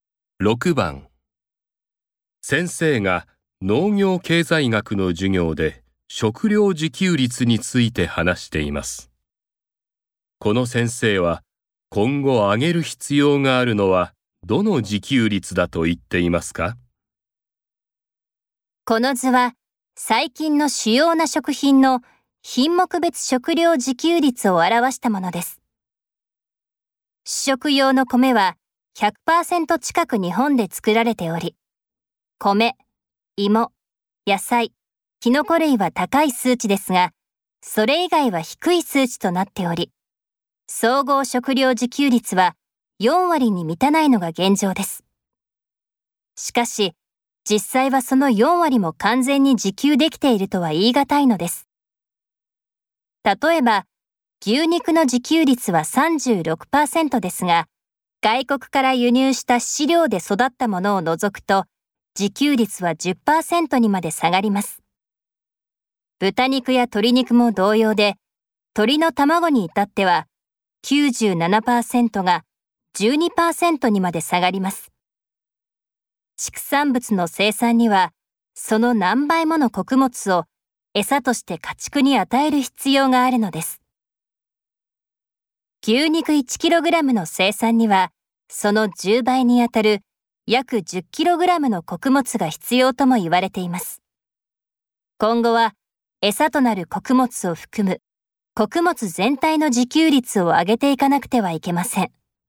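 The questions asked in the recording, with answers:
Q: この先生は今後上げる必要があるのはどの自給率だと言っていますか?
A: 餌となる穀物を含む穀物全体の自給率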